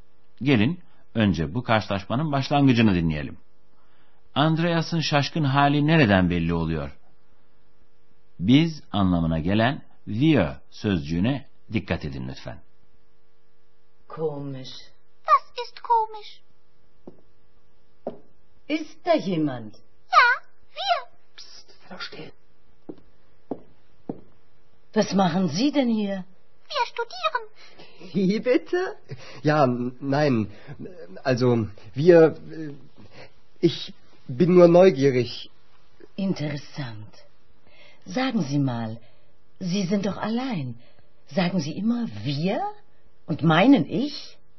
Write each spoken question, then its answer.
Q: Andreas'ın şaşkın hali nereden belli oluyor?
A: Tabii ki Andreas'ın şaşkınlığını konuşurken duraklamasından, ağzında sözü gevelemesinden anladınız.